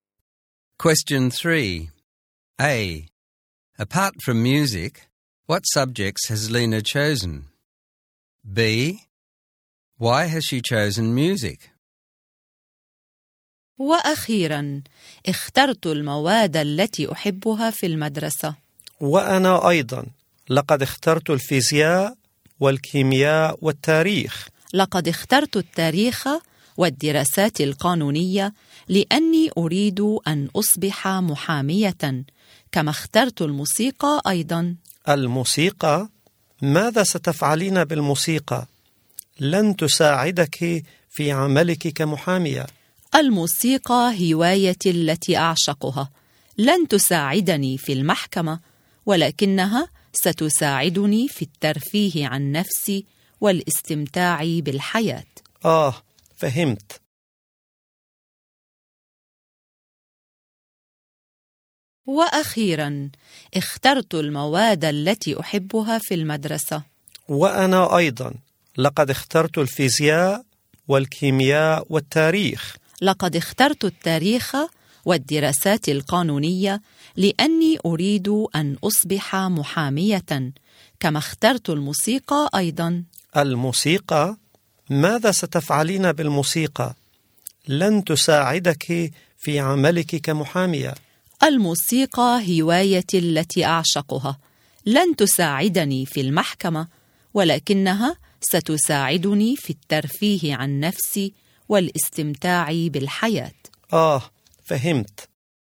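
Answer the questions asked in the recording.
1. History and legal studies
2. It is her favourite hobby; it helps her relax and enjoy life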